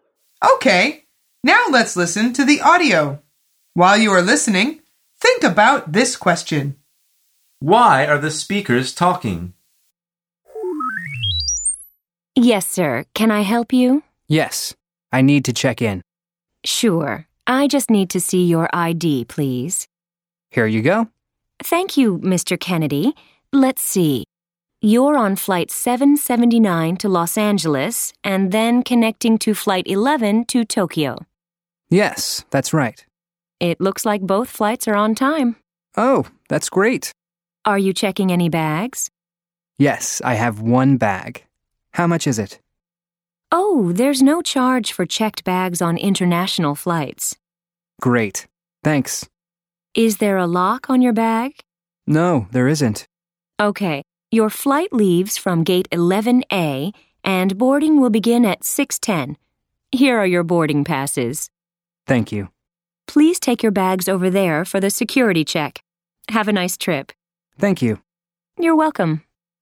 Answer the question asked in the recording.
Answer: The answer is the man is checking in for his flight.